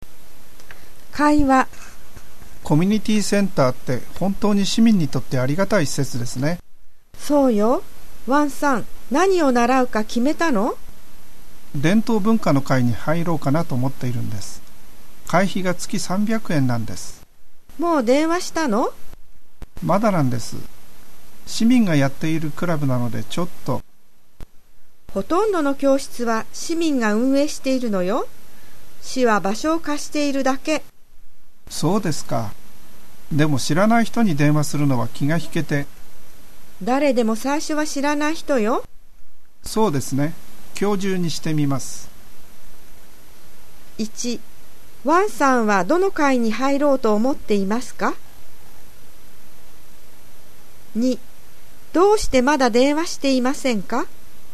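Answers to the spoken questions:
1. 伝統文化の会
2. 知らない人に電話するのは気が引けるから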